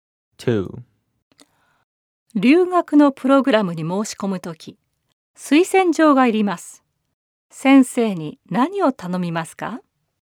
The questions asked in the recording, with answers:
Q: 先生に何を頼みますか?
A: 推薦状を書いていただけませんか?